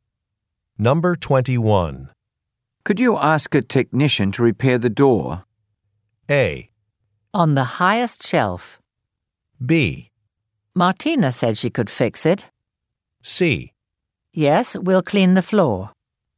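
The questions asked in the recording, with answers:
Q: Could you ask a technician to repair the door?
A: B: Martina said she could fix it.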